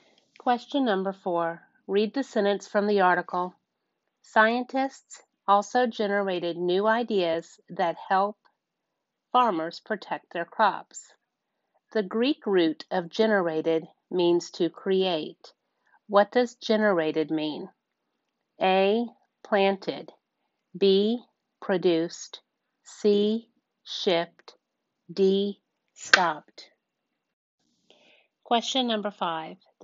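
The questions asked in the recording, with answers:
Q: What does generated mean?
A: B: Produced.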